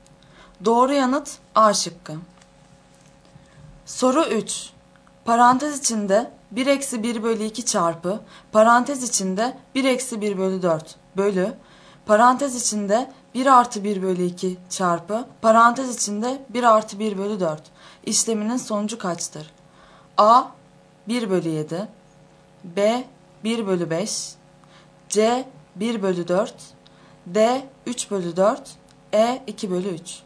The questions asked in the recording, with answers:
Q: Parantez içinde 1 eksi 1 bölü 2 çarpı parantez içinde 1 eksi 1 bölü 4 bölü parantez içinde 1 artı 1 bölü 2 çarpı parantez içinde 1 artı 1 bölü 4 işleminin sonucu kaçtır?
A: Doğru yanıt B şıkkı.